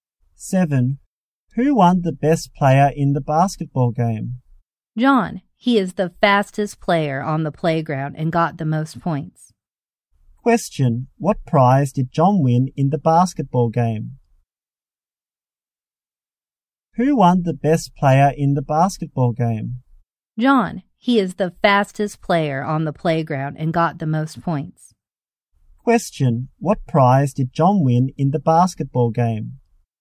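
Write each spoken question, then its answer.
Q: What prize did John win in the basketball game?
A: The best player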